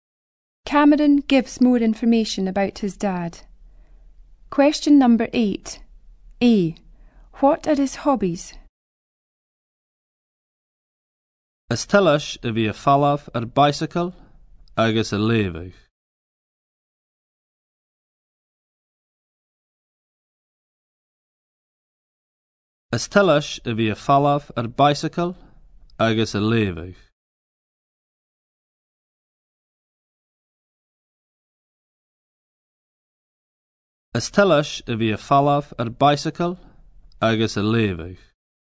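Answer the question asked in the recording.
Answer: Cycling and reading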